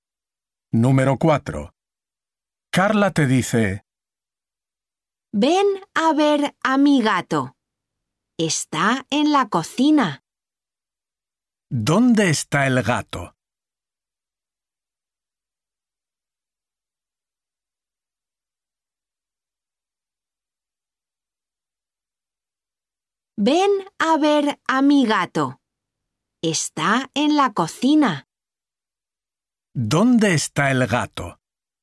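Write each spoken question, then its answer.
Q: ¿Dónde está el gato?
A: En la cocina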